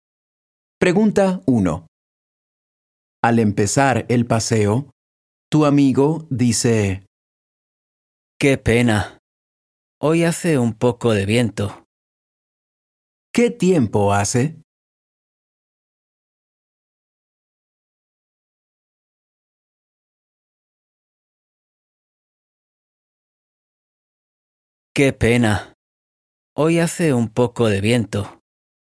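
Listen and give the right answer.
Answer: Hace un poco de viento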